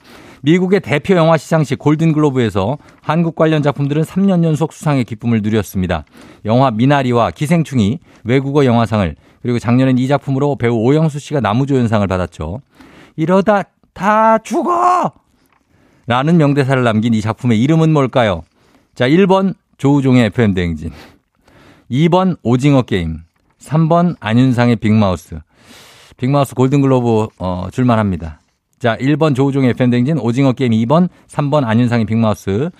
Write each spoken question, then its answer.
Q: 이러다 다 죽어! 라는 명대사를 남긴 이 작품의 이름은 뭘까요?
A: 지난해 골든글로브 나무조연상을 수상한 작품은 정답 2번 오징어 게임입니다.